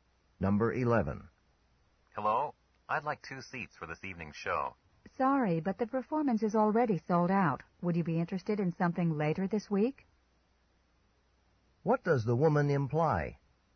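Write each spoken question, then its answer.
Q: What does the woman imply?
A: There are no seats left for tonight's show, but the man could get seats for a show later in the week.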